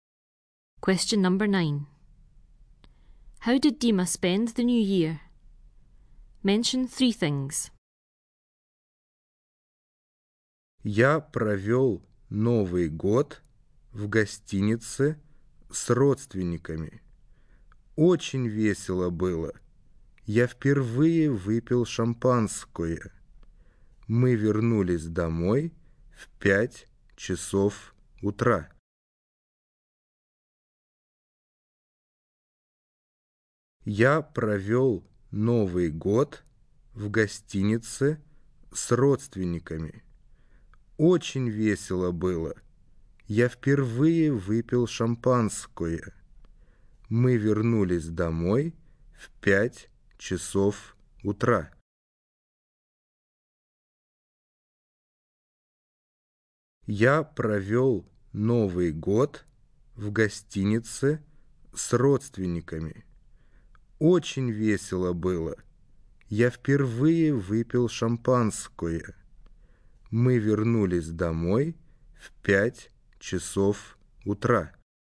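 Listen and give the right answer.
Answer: In a hotel with relatives; he drank champagne for the first time; they got home at 5 a.m.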